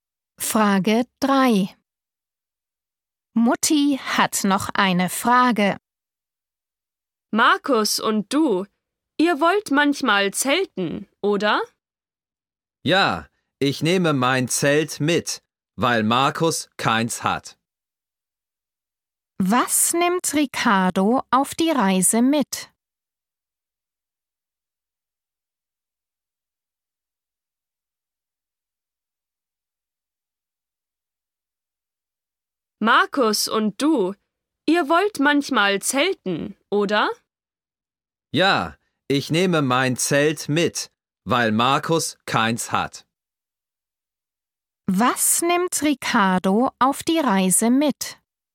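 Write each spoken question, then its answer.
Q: Was nimmt Ricardo auf die Reise mit?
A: sein Zelt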